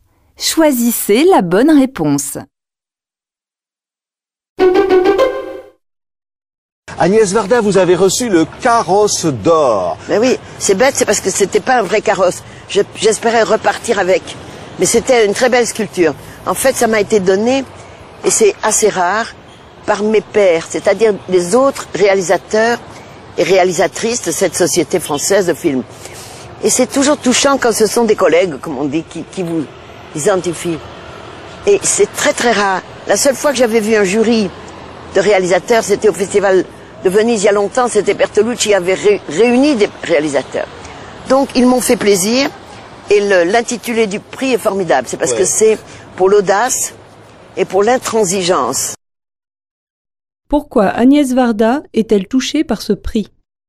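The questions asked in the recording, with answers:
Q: Pourquoi Agnès Varda est-elle touchée par ce prix ?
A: Parce qu'il lui a été décerné par ses pairs, d'autres réalisateurs (ses collègues).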